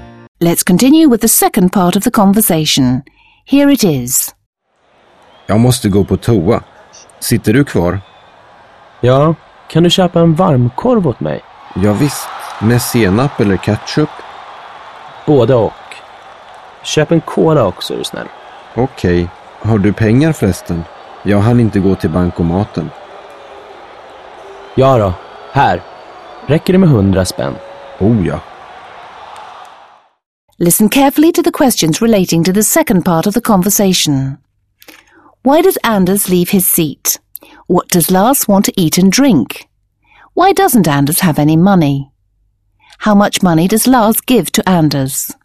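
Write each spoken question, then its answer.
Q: Why does Anders leave his seat?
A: He needs to go to the toilet

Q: What does Lars want to eat and drink?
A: A hot dog with mustard and ketchup, and a cola

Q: Why doesn't Anders have any money?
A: He didn't have time to go to the cash machine

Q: How much money does Lars give to Anders?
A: 100 kronor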